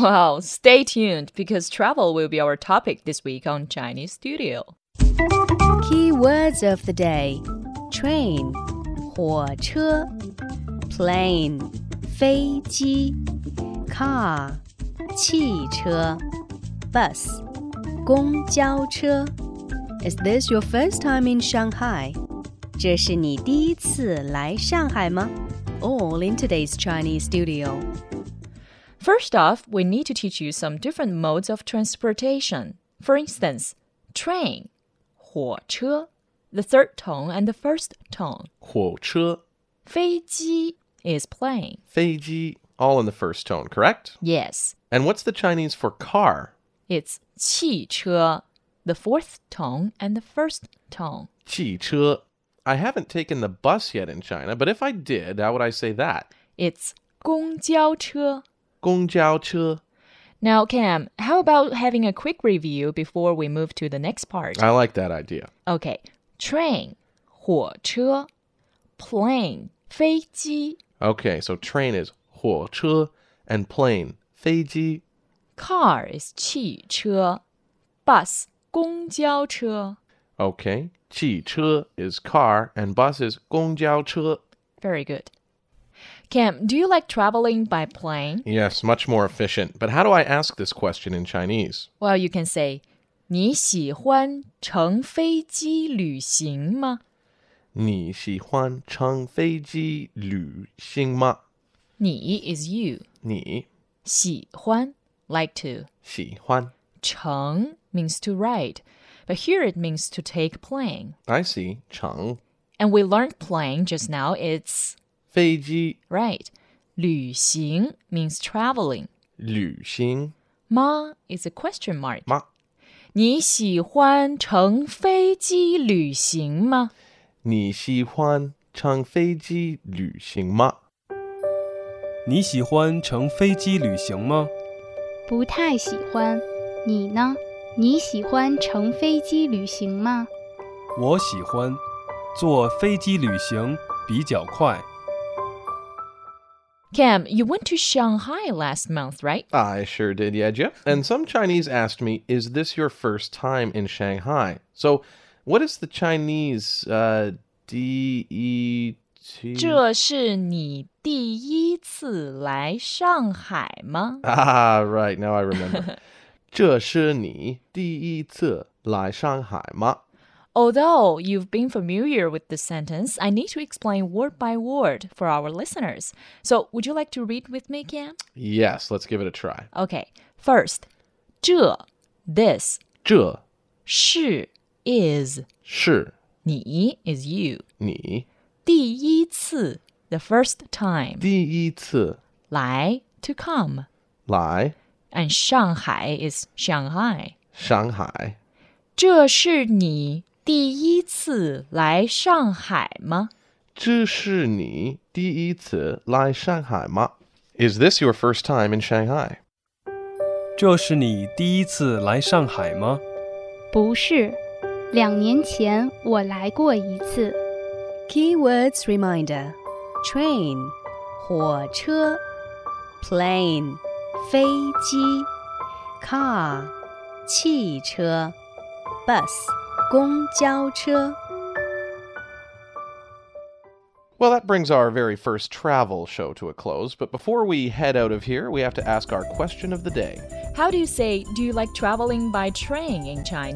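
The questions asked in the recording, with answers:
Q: How do you say, do you like traveling by train in Chinese?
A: 你喜欢乘火车旅行吗?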